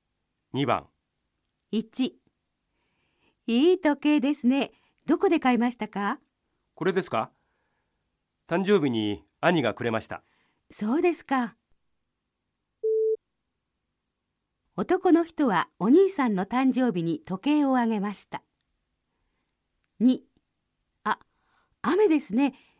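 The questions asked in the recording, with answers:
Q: 男の人はお兄さんの誕生日に時計をあげました。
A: ×(お兄さんが誕生日に時計をくれました)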